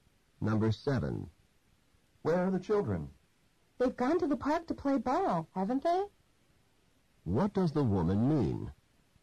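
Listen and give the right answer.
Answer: She thinks they went to the park, but isn't sure.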